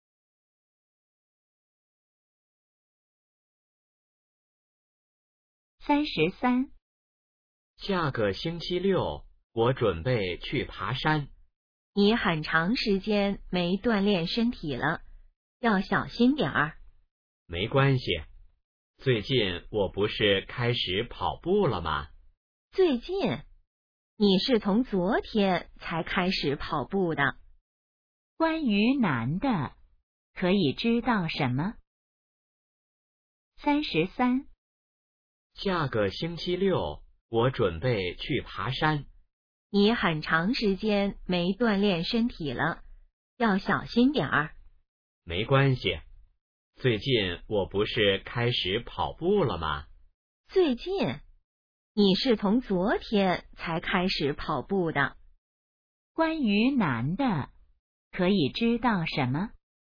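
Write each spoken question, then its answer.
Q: 关于男的,可以知道什么?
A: 昨天才开始跑步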